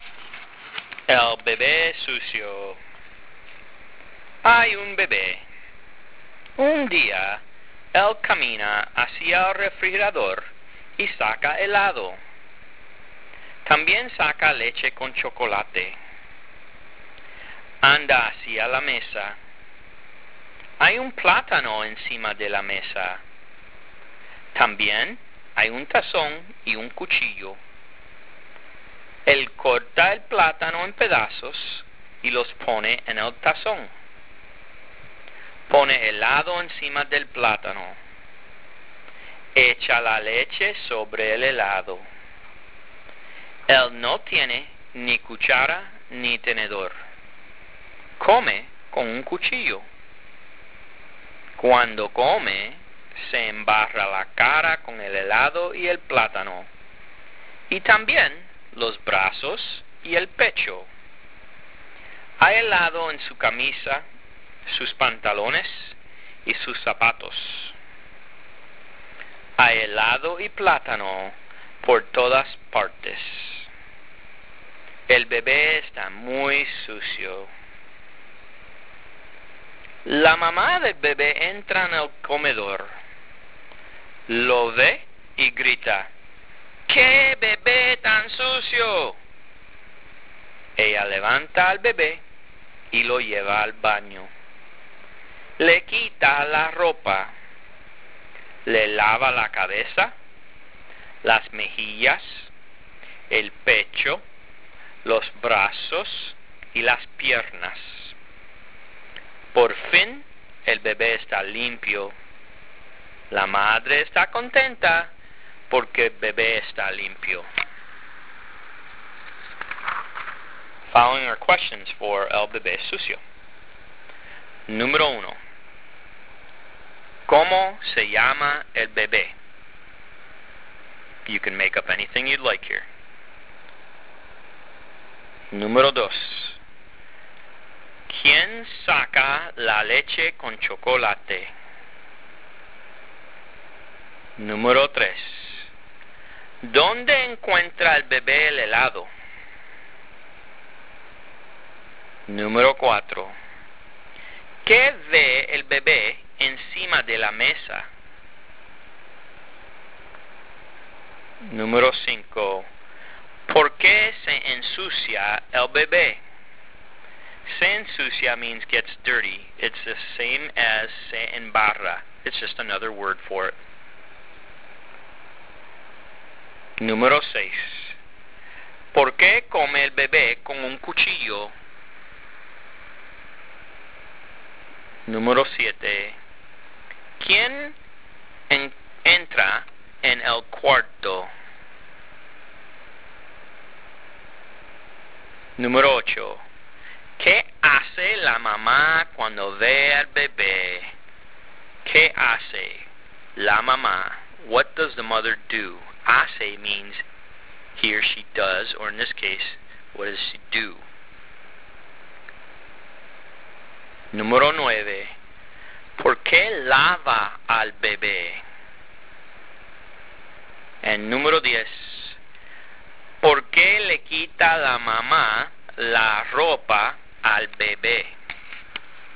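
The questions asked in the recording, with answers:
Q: ¿Quién saca la leche con chocolate?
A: El bebé

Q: ¿Dónde encuentra el bebé el helado?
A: En el refrigerador

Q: ¿Qué ve el bebé encima de la mesa?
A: Un plátano, un tazón y un cuchillo

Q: ¿Por qué se ensucia el bebé?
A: Porque come con un cuchillo y se embarra de helado y plátano

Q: ¿Por qué come el bebé con un cuchillo?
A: Porque no tiene ni cuchara ni tenedor

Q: ¿Quién entra en el cuarto?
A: La mamá del bebé

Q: ¿Qué hace la mamá cuando ve al bebé?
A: Grita: ¡Qué bebé tan sucio!

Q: ¿Por qué lava al bebé?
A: Porque el bebé está muy sucio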